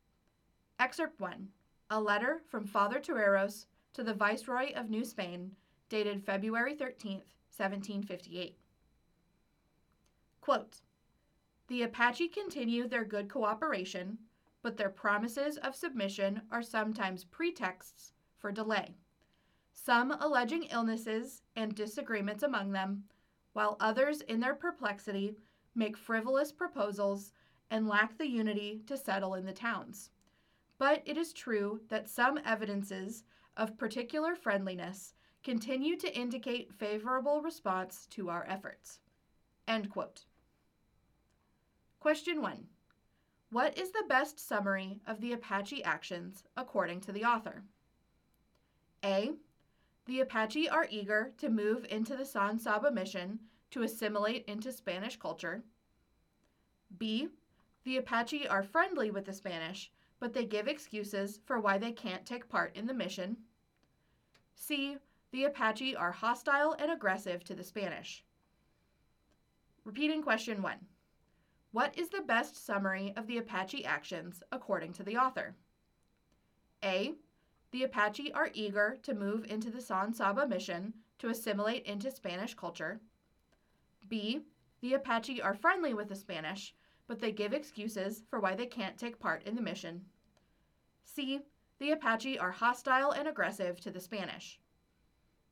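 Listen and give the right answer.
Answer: B: The Apache are friendly with the Spanish, but they give excuses for why they can't take part in the mission.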